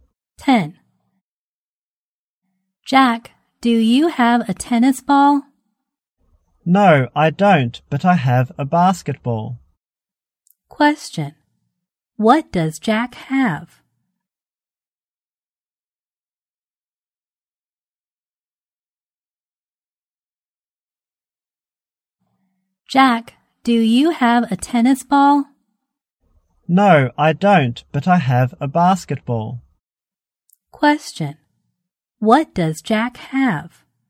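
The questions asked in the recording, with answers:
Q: What does Jack have?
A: A basketball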